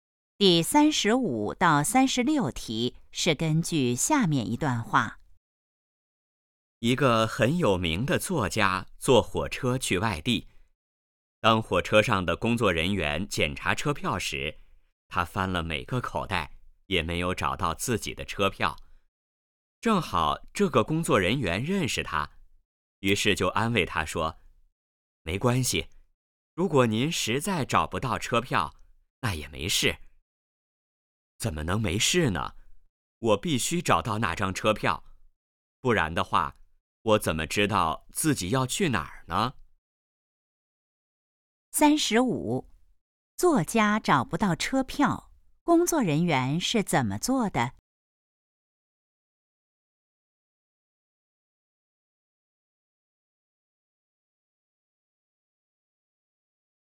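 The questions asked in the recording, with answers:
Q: 作家找不到车票,工作人员是怎么做的?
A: 安慰他说没关系

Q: 作家为什么一定要找车票?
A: 不知道自己要去哪儿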